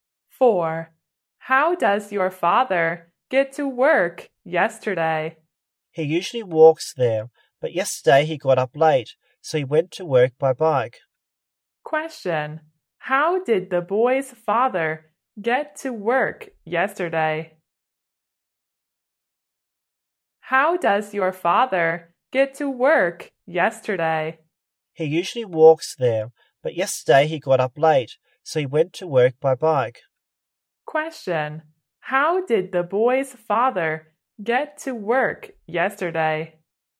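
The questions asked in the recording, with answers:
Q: How did the boy's father get to work yesterday?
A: By bike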